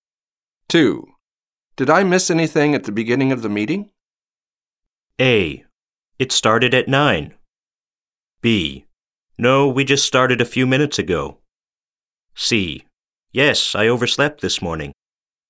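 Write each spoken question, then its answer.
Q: Did I miss anything at the beginning of the meeting?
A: B: No, we just started a few minutes ago.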